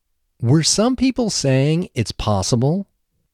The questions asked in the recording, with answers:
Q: Were some people saying it's possible?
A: Yes, some people were saying it's possible.